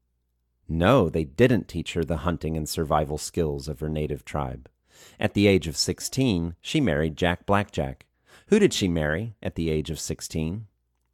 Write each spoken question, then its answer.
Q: Who did she marry at the age of 16?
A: She married Jack Blackjack at the age of 16.